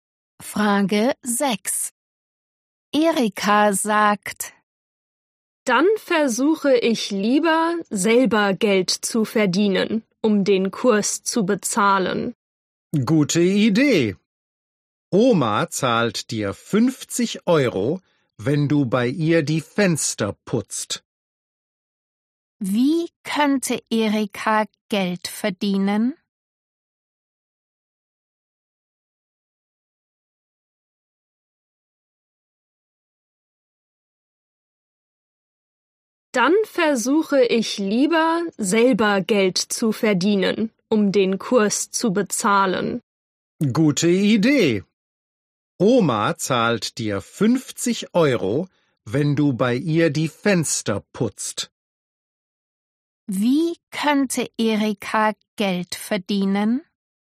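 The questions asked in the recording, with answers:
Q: Wie könnte Erika Geld verdienen?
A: bei Oma die Fenster putzen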